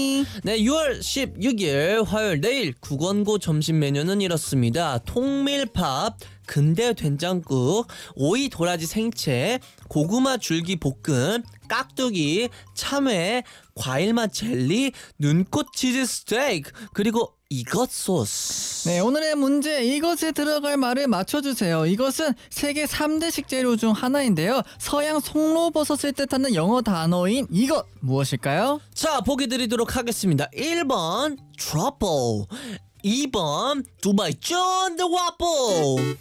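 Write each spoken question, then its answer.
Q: 이것은 세계 3대 식재료 중 하나인데요. 서양 송로버섯을 뜻하는 영어 단어인 이것 무엇일까요?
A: 1: 트러플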